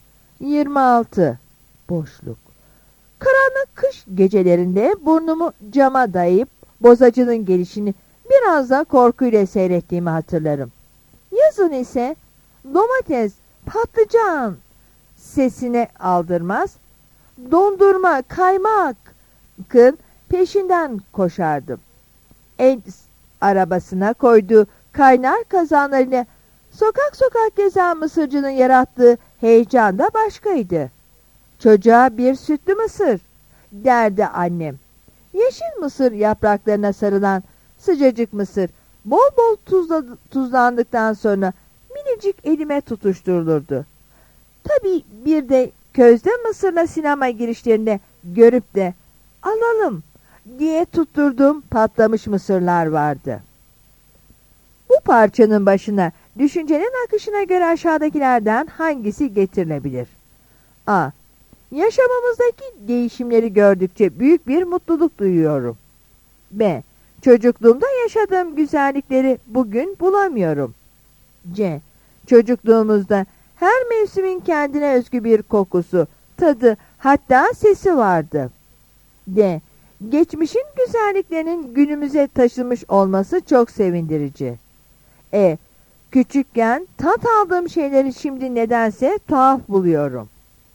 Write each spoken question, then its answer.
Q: Bu parçanın başına düşüncenin akışına göre aşağıdakilerden hangisi getirilebilir?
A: Yanıt C'dir.